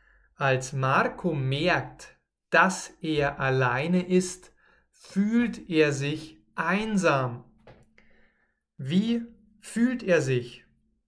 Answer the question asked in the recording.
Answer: Einsam. Er fühlt sich einsam.